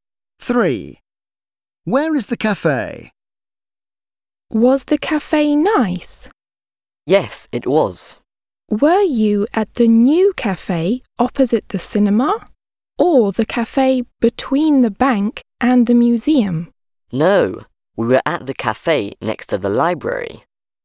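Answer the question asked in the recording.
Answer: next to the library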